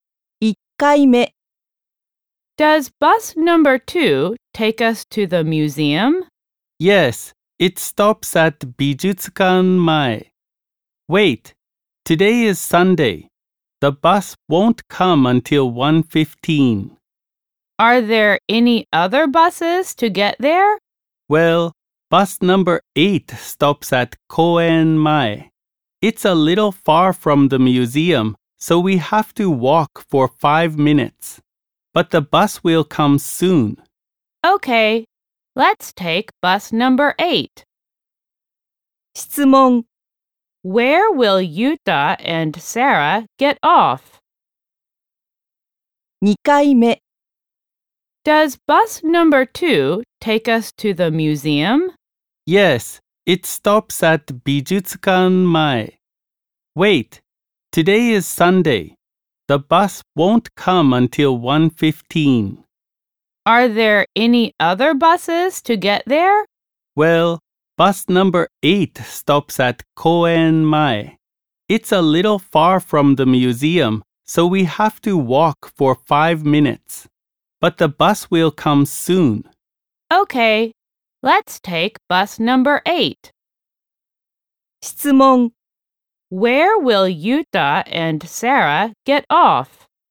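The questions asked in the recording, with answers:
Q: Where will Yuta and Sarah get off?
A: At Koen Mae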